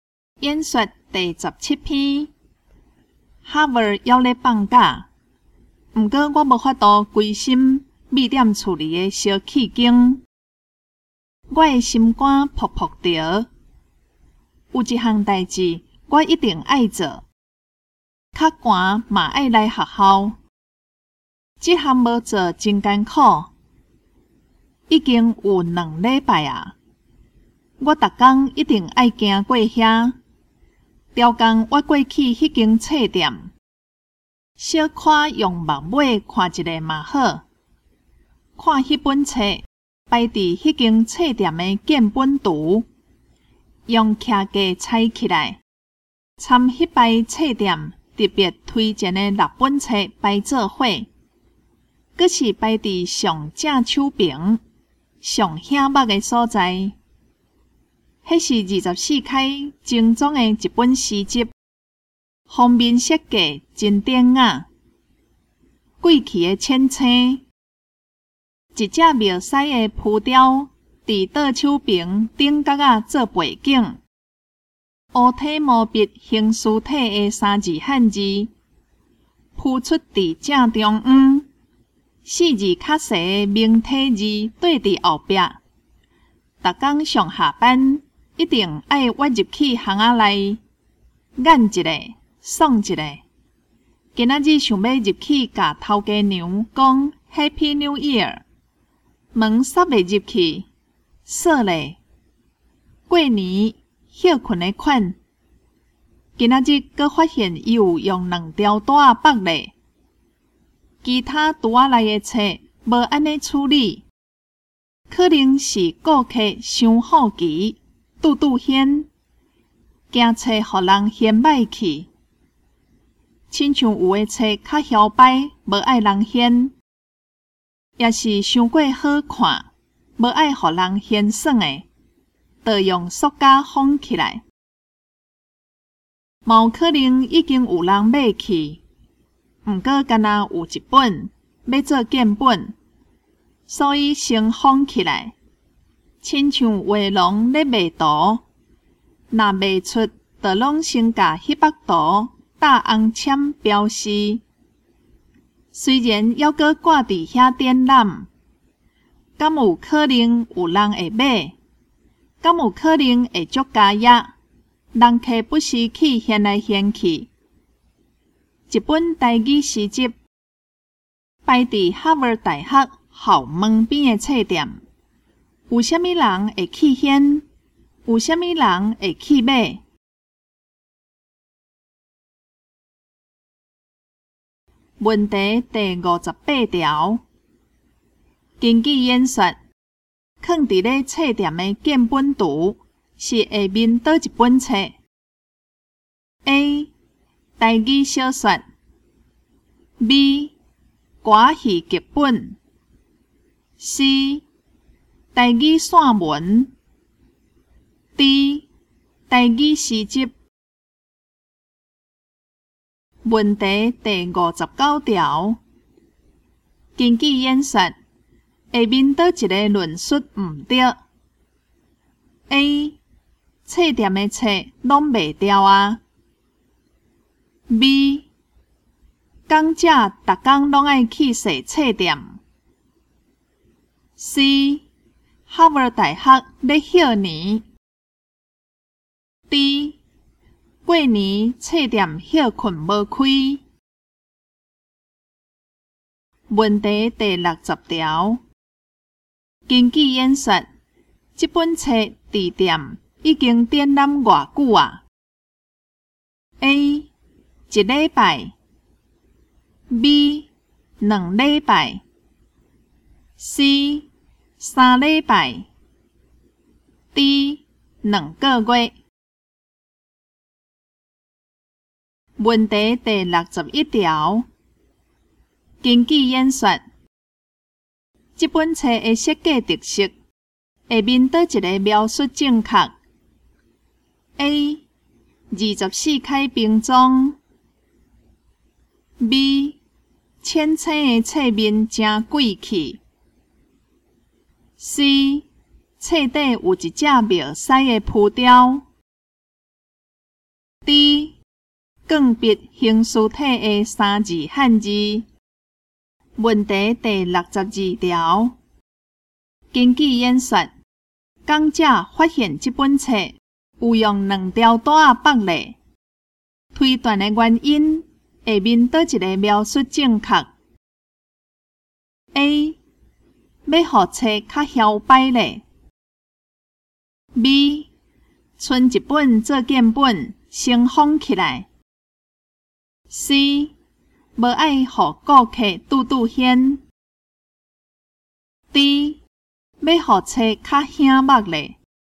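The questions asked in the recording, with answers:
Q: 根据演说,放伫咧册店的建本图是下面倒一本册 ?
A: D: 台语诗集

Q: 根据演说,下面倒一个论述唔对 ?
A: A: 册店的册拢卖掉啊

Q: 根据演说,这本册的设计特色,下面倒一个描述正确 ?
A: B: 浅青的册面真贵气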